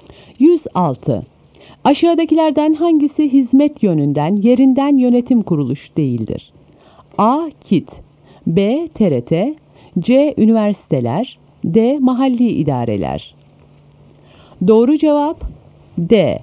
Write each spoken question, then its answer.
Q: Aşağıdakilerden hangisi hizmet yönünden yerinden yönetim kuruluşu değildir?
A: Doğru cevap D.